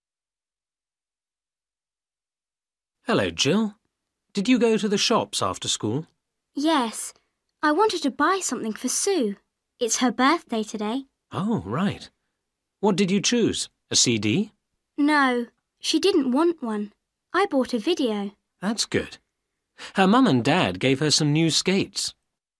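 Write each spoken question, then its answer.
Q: What did Jill buy at the shops?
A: A video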